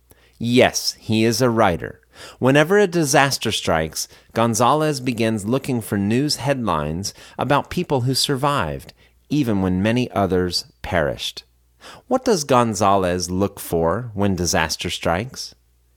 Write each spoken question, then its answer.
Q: What does Gonzalez look for when disaster strikes?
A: When disaster strikes, he looks for news headlines about people who survived.